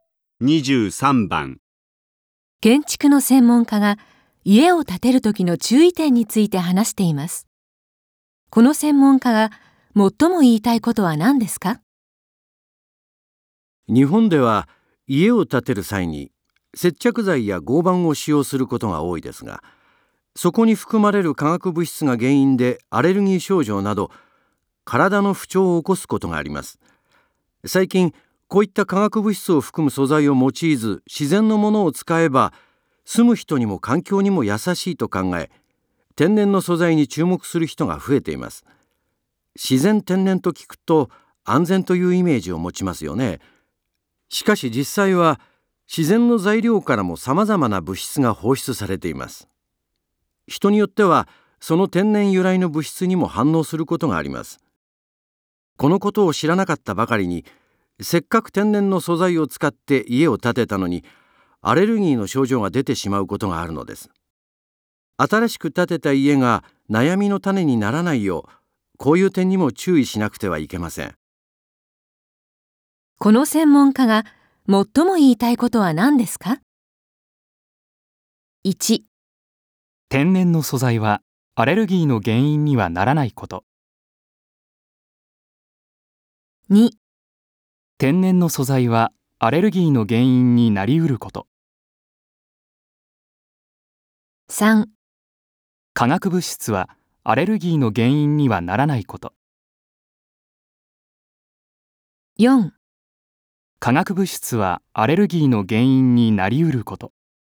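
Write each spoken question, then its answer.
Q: この専門家が最も言いたいことは何ですか?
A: 2: 天然の素材はアレルギーの原因になりうること。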